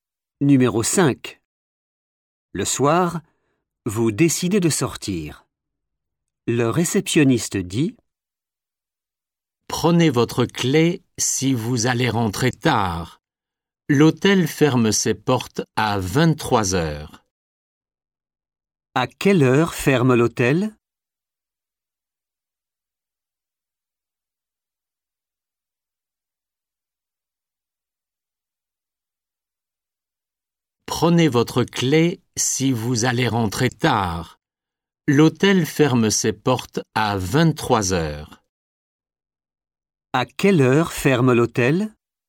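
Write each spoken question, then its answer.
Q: À quelle heure ferme l'hôtel?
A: à 23 heures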